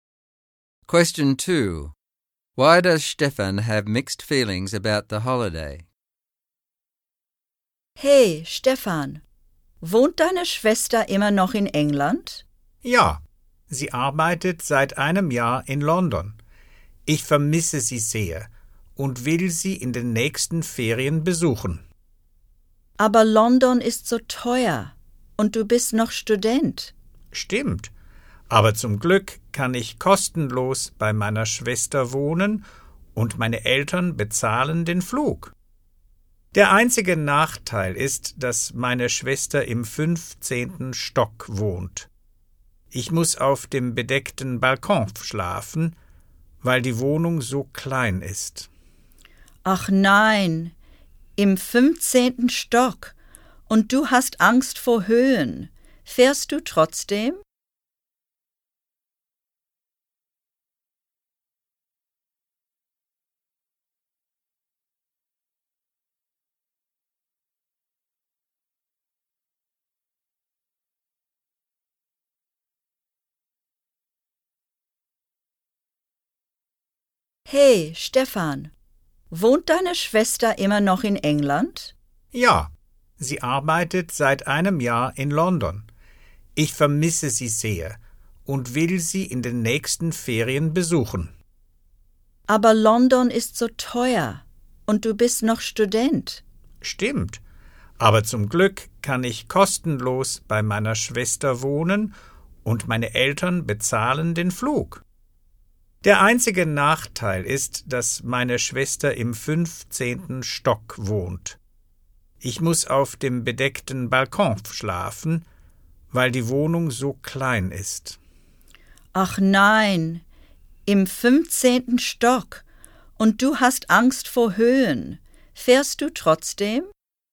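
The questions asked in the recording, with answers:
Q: Why does Stefan have mixed feelings about the holiday?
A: He misses his sister and can stay with her for free while his parents pay for the flight, but she lives on the 15th floor and he is afraid of heights, and he has to sleep on the balcony.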